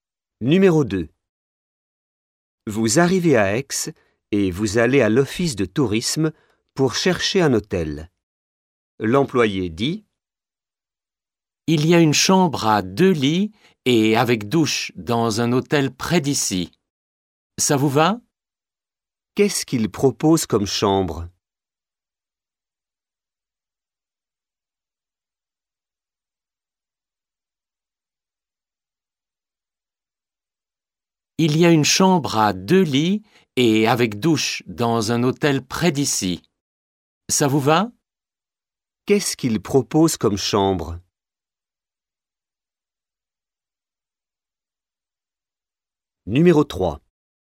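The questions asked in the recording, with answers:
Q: Qu'est-ce qu'il propose comme chambre?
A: Une chambre à deux lits avec douche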